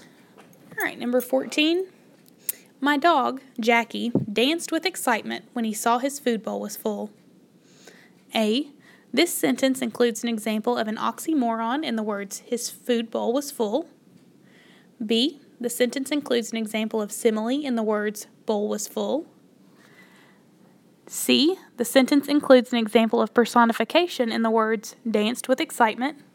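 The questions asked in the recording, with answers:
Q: My dog, Jackie, danced with excitement when he saw his food bowl was full.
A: C: the sentence includes an example of personification in the words, danced with excitement.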